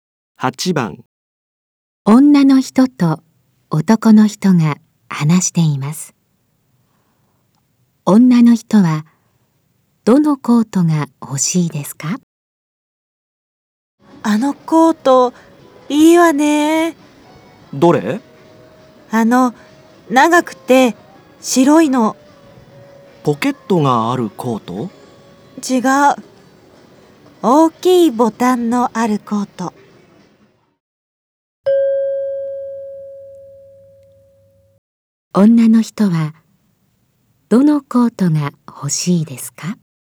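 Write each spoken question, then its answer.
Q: 女の人はどのコートが欲しいですか?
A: 長くて白い、大きいボタンのあるコート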